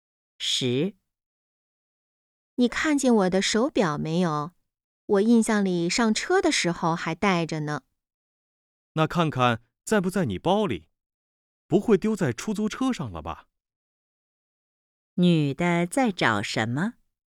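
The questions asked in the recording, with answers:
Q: 女的在找什么?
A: 手表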